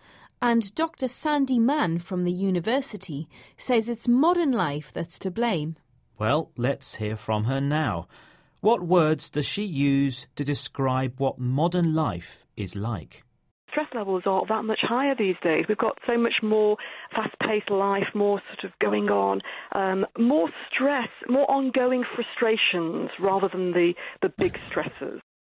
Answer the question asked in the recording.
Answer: So, she says modern life is fast-paced.